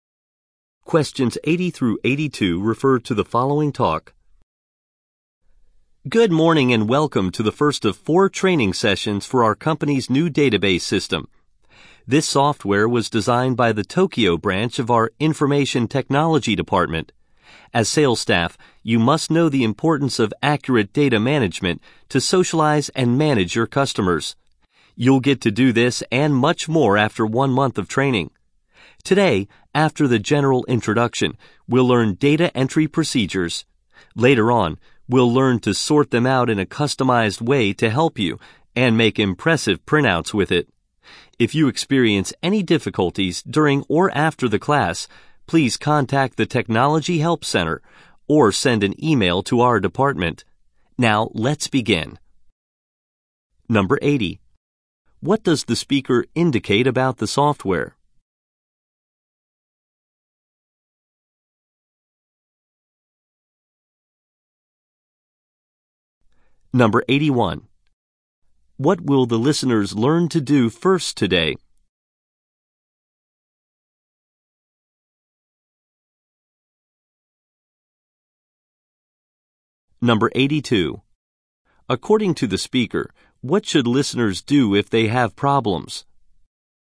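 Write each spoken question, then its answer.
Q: What does the speaker indicate about the software?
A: It was designed by the Tokyo branch of the IT Department

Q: What will the listeners learn to do first today?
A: Data entry procedures

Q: According to the speaker, what should listeners do if they have problems?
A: Contact the Technology Help Center or email the department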